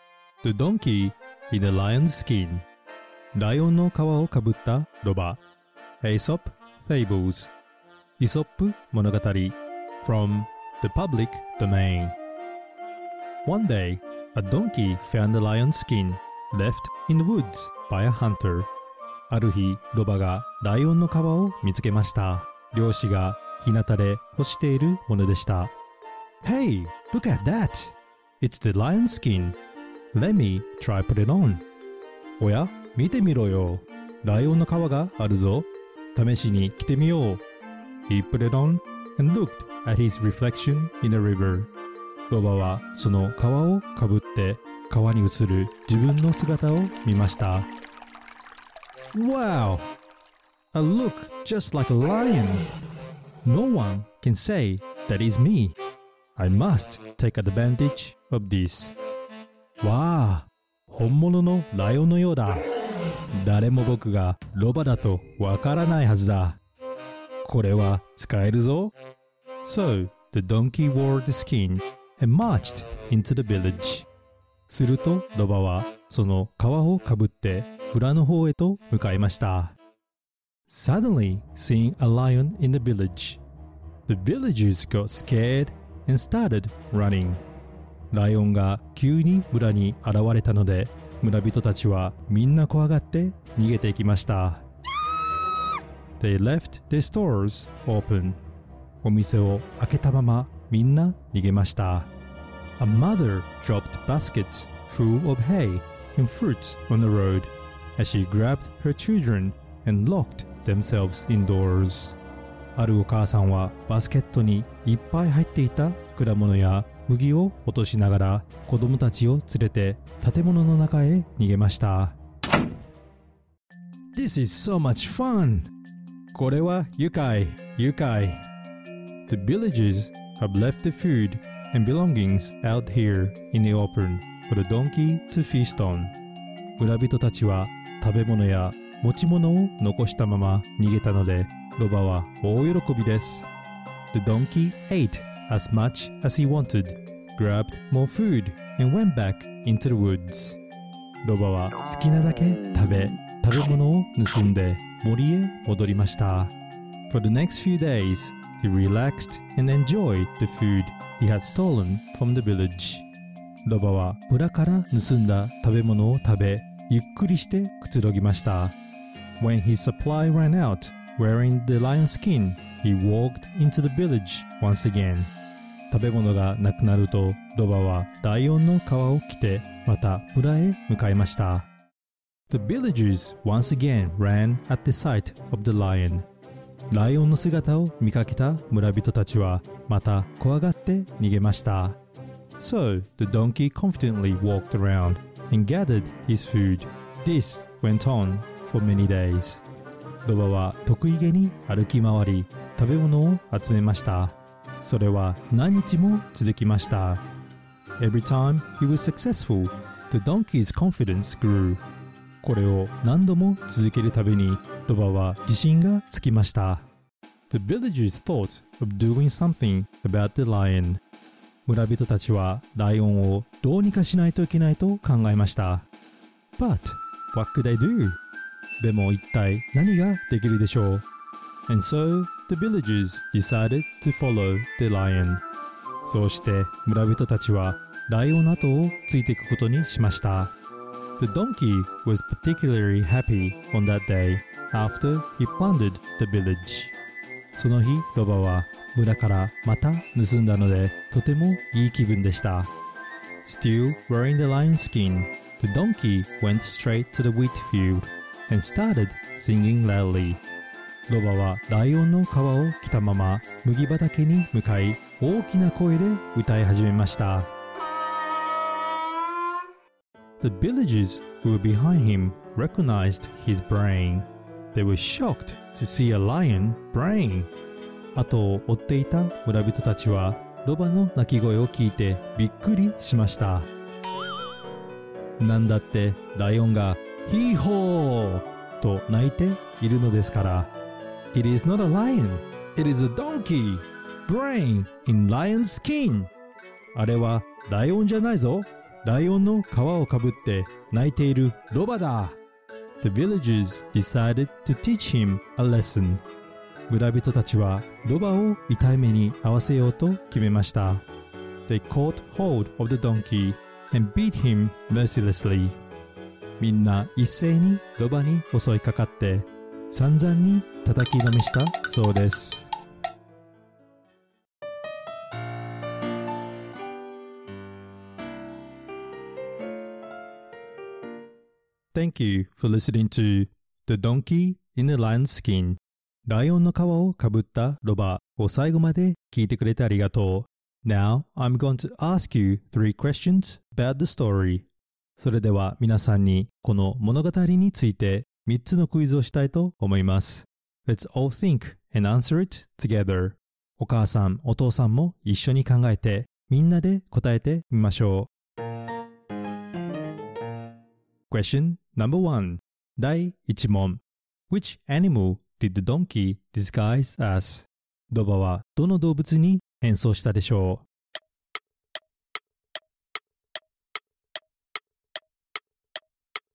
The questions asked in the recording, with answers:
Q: Which animal did the donkey disguise as?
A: He disguised as a lion